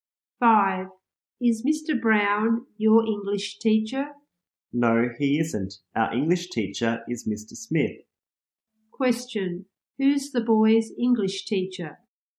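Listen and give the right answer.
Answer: Mr. Smith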